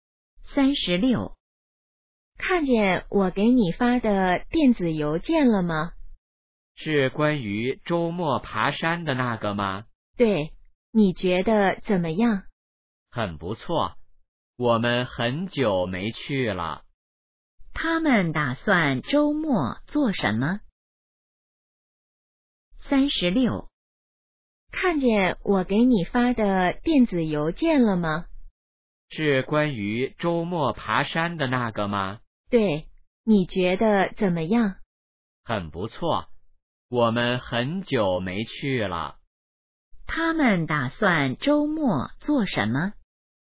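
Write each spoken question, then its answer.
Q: 他们打算周末做什么?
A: 爬山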